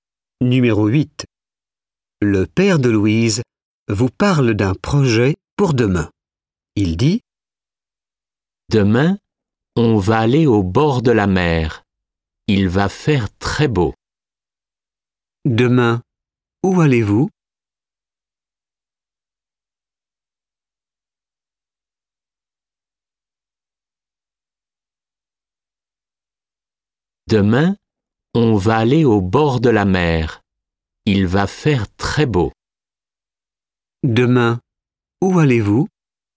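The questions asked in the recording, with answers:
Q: Demain, où allez-vous?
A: au bord de la mer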